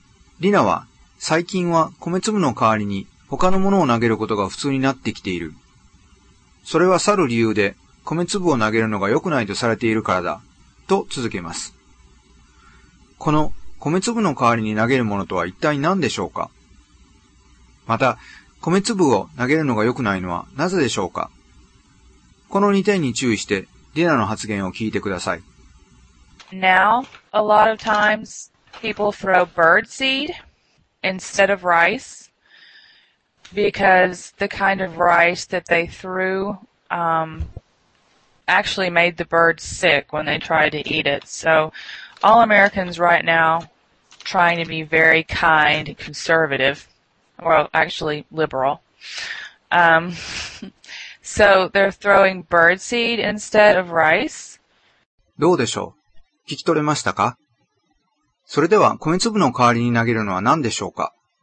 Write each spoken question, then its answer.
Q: この米粒の代わりに投げるものとは一体何でしょうか?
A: 答えは、bird seed。つまり、鳥の絵になる種ですね。

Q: また、米粒を投げるのが良くないのはなぜでしょうか?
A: 答えは、ライスシャワーで投げられる米粒を鳥が食べて病気になるからですね。